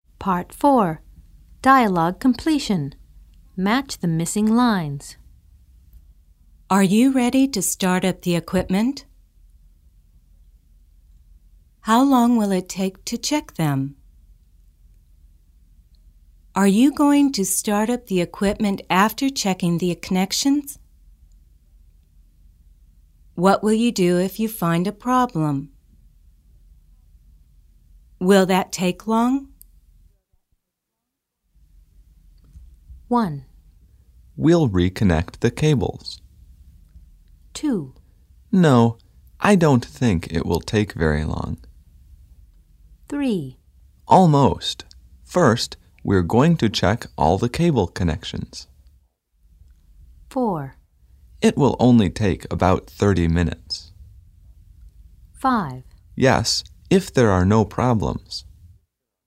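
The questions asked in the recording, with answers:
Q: Are you ready to start up the equipment?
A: 3: Almost. First, we're going to check all the cable connections.

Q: How long will it take to check them?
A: 4: It will only take about 30 minutes.

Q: Are you going to start up the equipment after checking the connections?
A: 5: Yes, if there are no problems.

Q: What will you do if you find a problem?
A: 1: We'll reconnect the cables.

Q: Will that take long?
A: 2: No, I don't think it will take very long.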